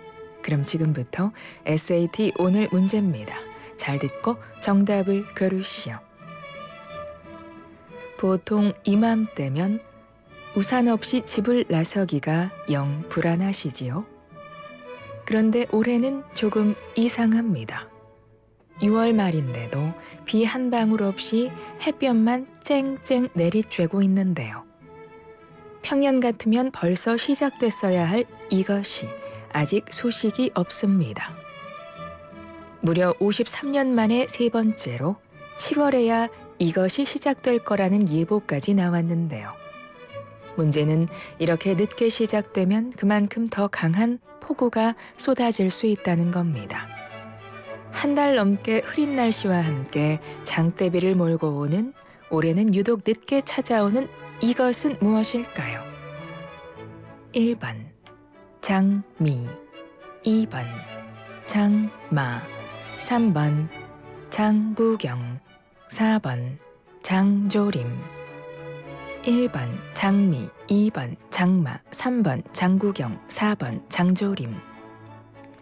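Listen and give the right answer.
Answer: 2: 장마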